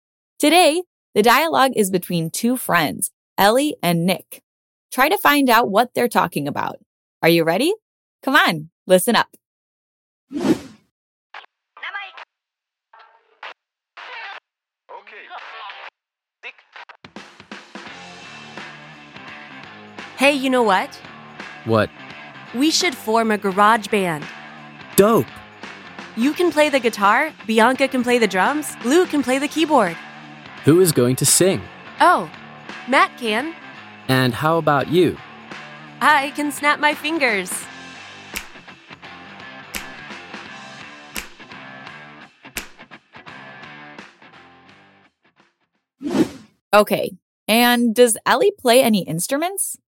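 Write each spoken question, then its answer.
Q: Try to find out what they're talking about.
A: Forming a garage band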